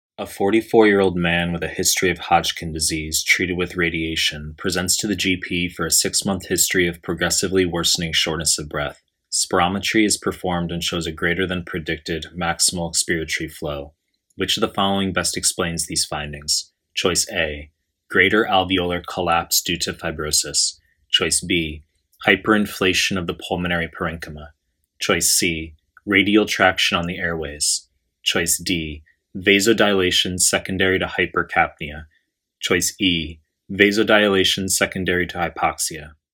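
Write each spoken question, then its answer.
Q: Which of the following best explains these findings?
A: C: radial traction on the airways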